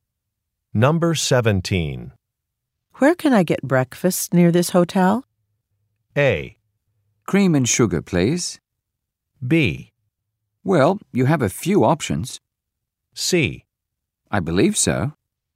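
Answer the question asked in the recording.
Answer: B: Well, you have a few options.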